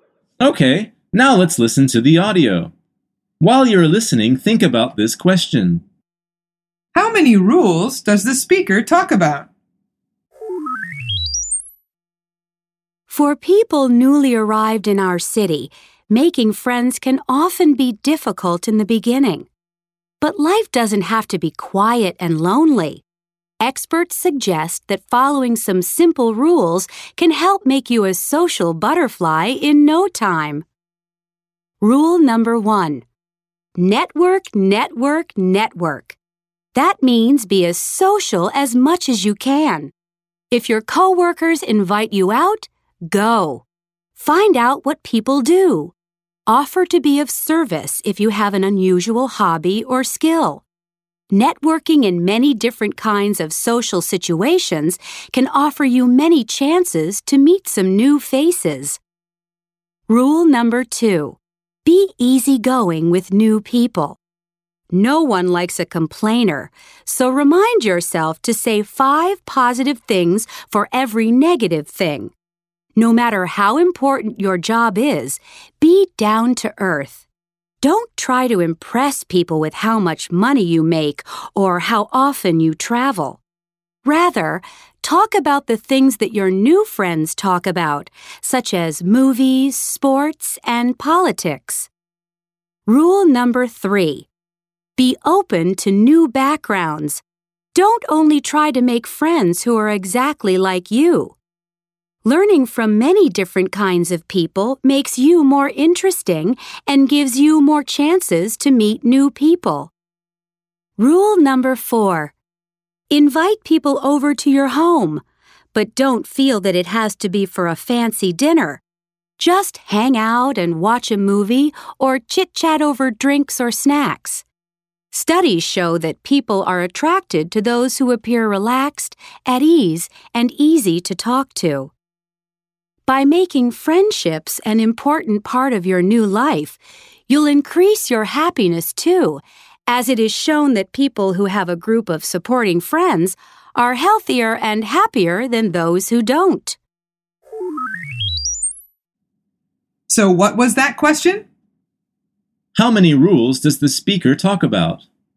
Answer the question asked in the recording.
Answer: The answer is four.